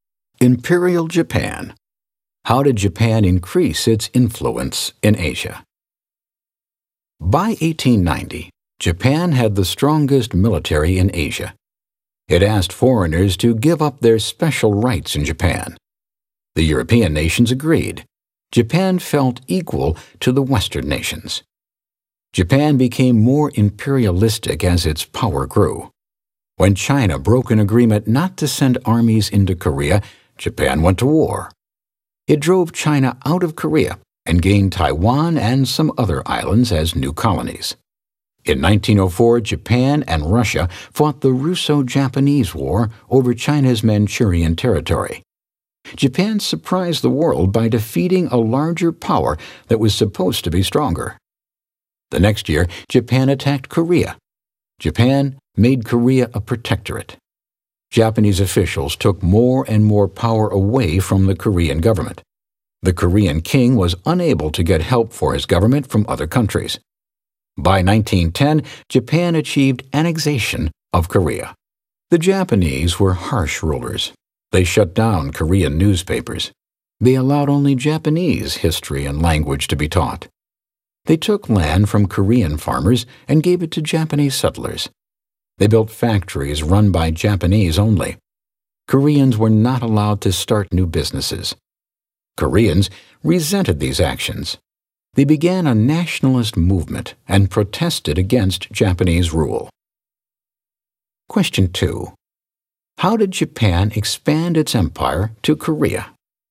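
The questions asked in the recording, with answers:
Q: How did Japan expand its empire to Korea?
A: It drove China out of Korea, attacked Korea and made it a protectorate in 1905, then annexed it by 1910.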